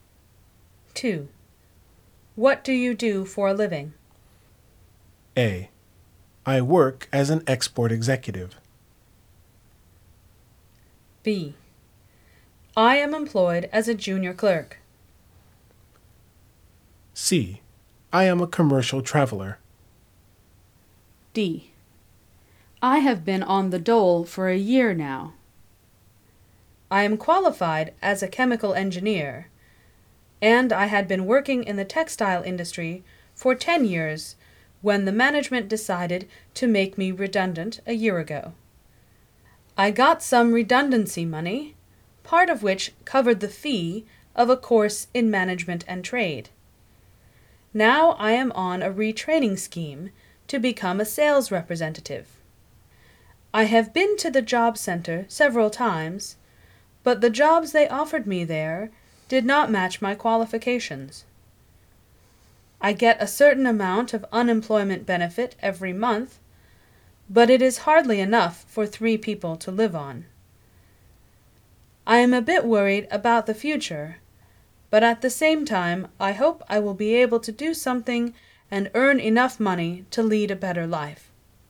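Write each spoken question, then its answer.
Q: What do you do for a living?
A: D: I have been on the dole for a year now.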